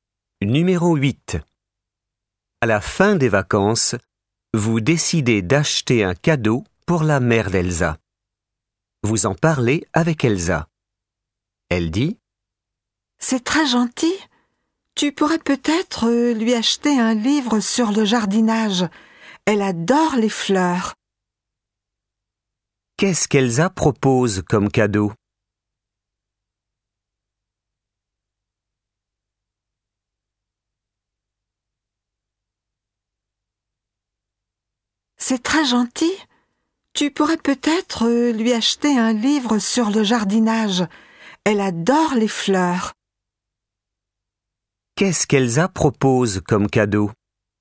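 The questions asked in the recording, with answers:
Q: Qu'est-ce qu'Elsa propose comme cadeau ?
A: Un livre sur le jardinage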